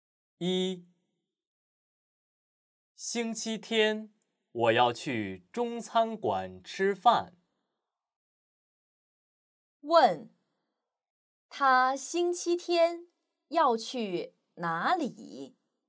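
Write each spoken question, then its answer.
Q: 问他星期天要去哪里?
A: 中餐馆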